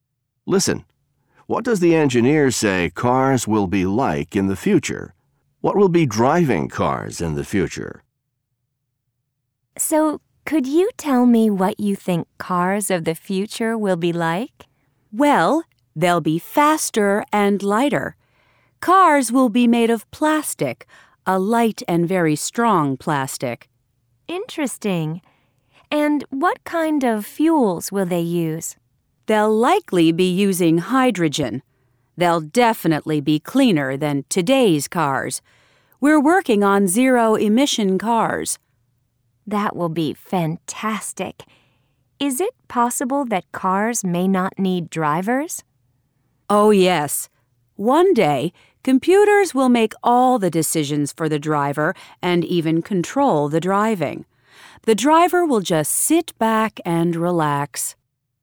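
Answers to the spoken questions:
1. Faster, lighter, made of strong light plastic, using hydrogen, cleaner
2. Computers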